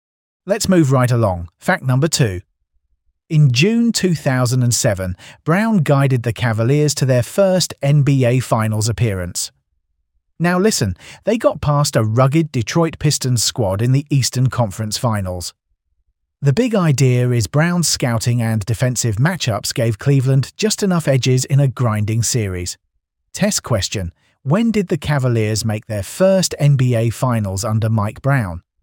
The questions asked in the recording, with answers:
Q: when did the Cavaliers make their first NBA Finals under Mike Brown?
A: 2007.